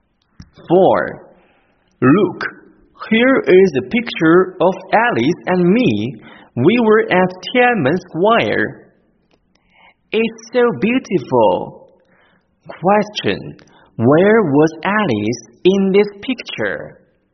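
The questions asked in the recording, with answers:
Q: Where was Alice in this picture?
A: At Tiananmen Square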